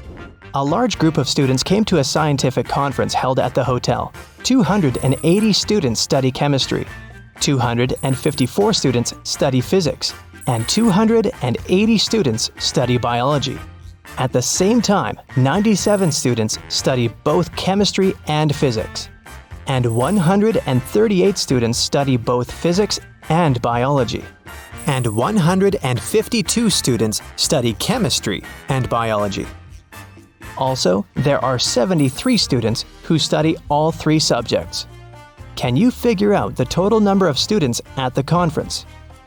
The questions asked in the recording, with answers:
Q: Can you figure out the total number of students at the conference?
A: Now, it's obvious that the total number of students is 500.